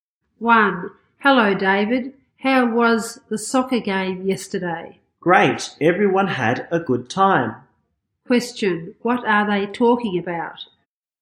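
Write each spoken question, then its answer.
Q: What are they talking about?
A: The soccer game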